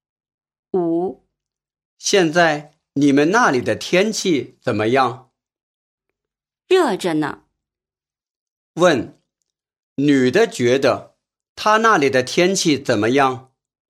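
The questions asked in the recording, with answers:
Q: 问,女的觉得她那里的天气怎么样?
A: 很热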